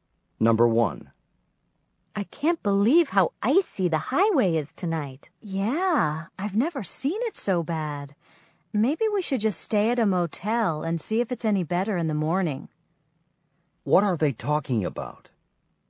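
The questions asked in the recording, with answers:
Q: What are they talking about?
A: The icy highway / bad road conditions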